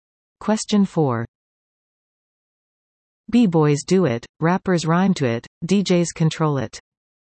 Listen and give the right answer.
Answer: The answer? Break dancing.